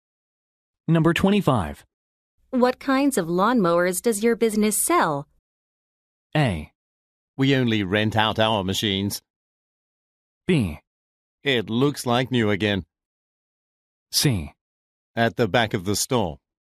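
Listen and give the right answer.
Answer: A: We only rent out our machines.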